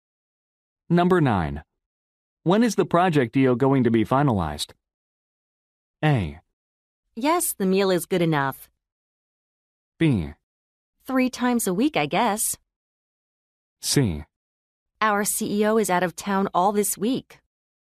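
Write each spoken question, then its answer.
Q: When is the project deal going to be finalized?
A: C: Our CEO is out of town all this week.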